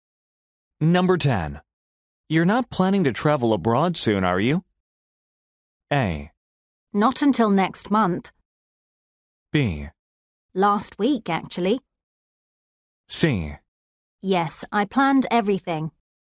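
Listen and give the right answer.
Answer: A: Not until next month.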